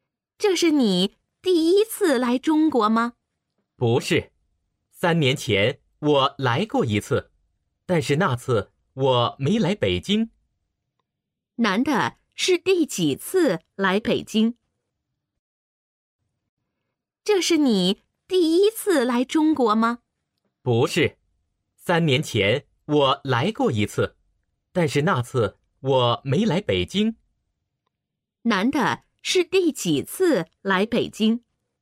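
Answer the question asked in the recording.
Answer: 第一次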